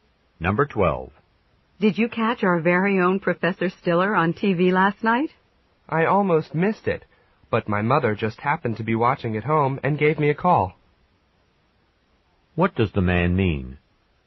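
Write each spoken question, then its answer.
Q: What does the man mean?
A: He saw the program only because his mother called him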